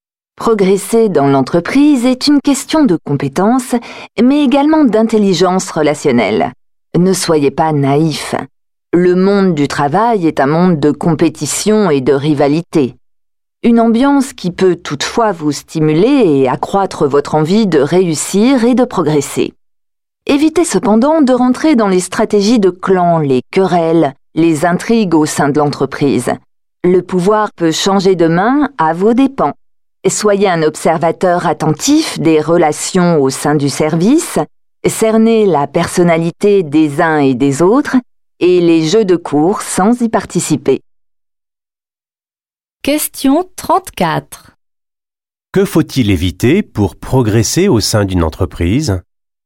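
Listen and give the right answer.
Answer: Rentrer dans les stratégies de clan, les querelles et les intrigues au sein de l'entreprise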